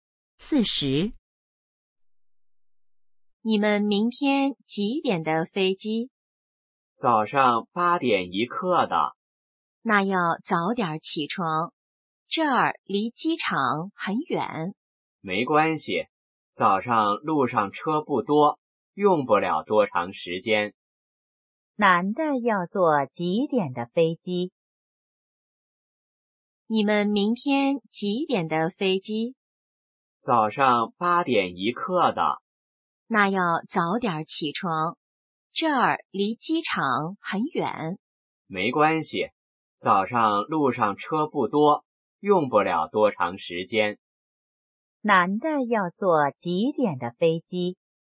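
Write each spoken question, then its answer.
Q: 男的要坐几点的飞机?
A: 八点一刻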